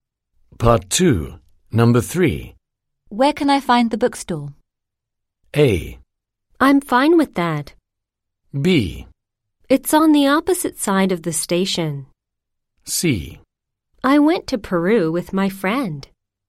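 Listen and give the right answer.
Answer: B: It's on the opposite side of the station.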